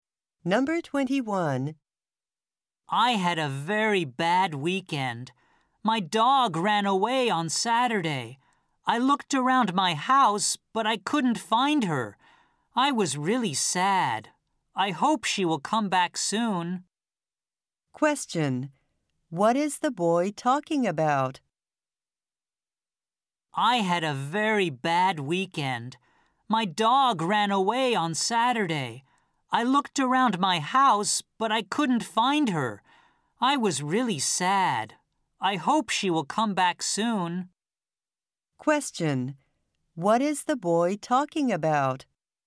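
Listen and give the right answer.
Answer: His dog that ran away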